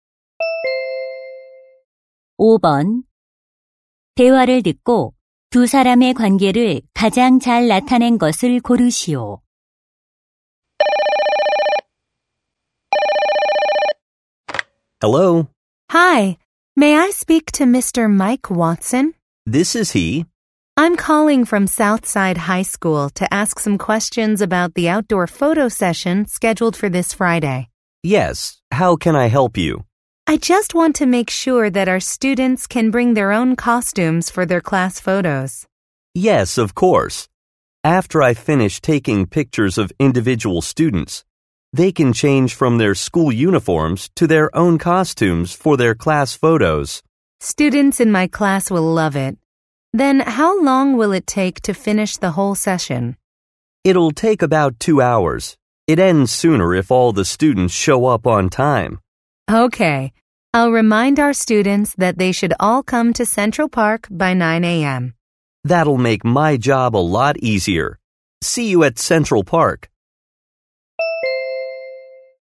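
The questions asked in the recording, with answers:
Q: 대화를 듣고 두 사람의 관계를 가장 잘 나타낸 것을 고르시오.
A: 교사 - 사진작가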